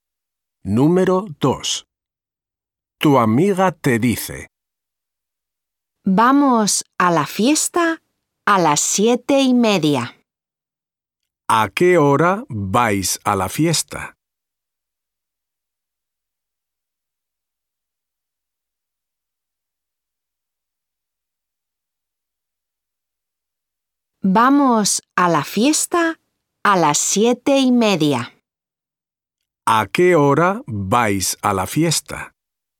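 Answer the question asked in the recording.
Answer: A las 7:30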